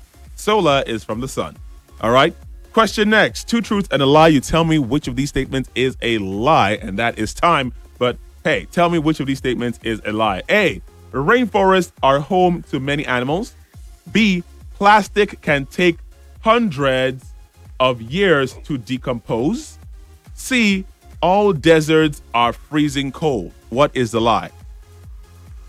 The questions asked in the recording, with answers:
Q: tell me which of these statements is a lie.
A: The answer was C. All deserts are freezing cold.